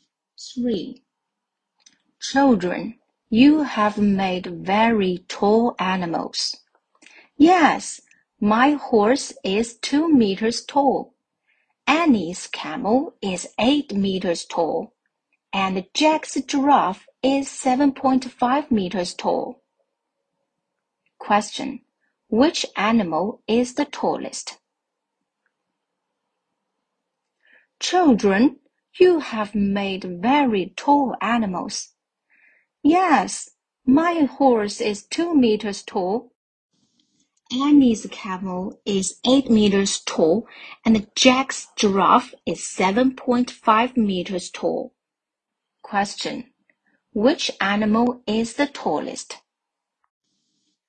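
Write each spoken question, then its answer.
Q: Which animal is the tallest?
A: Annie's camel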